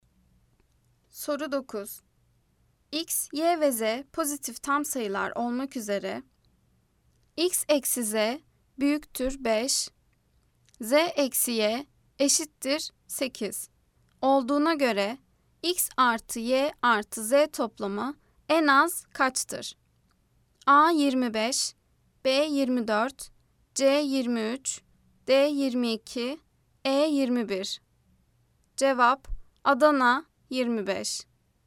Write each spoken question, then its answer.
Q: Olduğuna göre X artı Y artı Z toplamı en az kaçtır?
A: Cevap Adana 25.